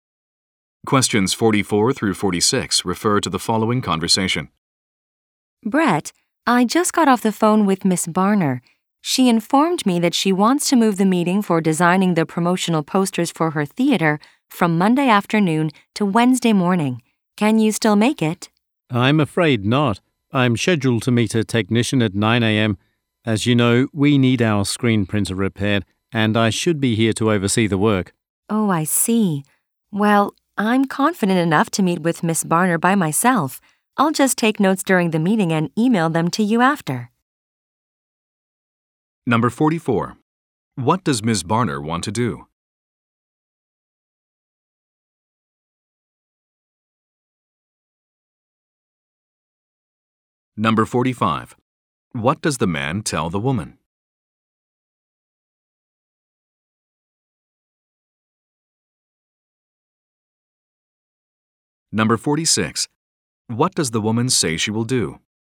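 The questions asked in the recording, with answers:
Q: What does Miss Barner want to do?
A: Move the meeting to Wednesday morning

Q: What does the man tell the woman?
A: He has to meet a technician at 9 a.m.

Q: What does the woman say she will do?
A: Meet Miss Barner alone and email him notes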